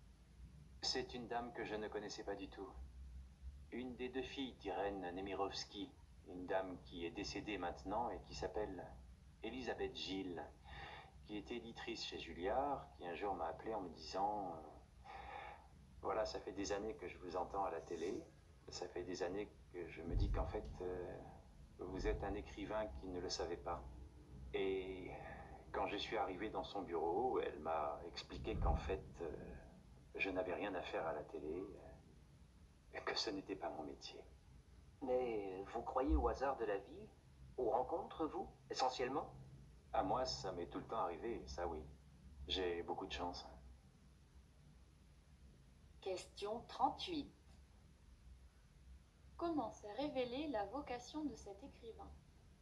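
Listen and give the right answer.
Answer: Grâce à une rencontre due au hasard : une éditrice (Elisabeth Gilles) l'a appelé pour lui dire qu'il était un écrivain qui s'ignorait.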